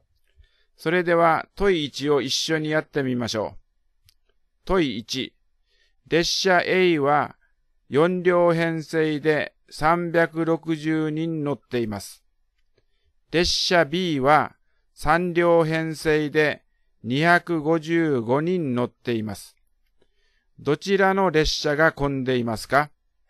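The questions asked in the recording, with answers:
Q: どちらの列車が混んでいますか?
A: 列車A(1両あたり90人、列車Bは85人)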